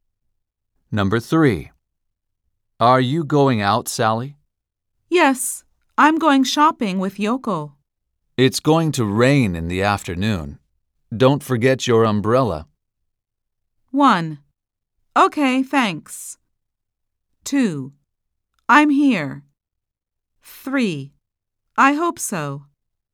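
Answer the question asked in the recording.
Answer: 1: Okay, thanks.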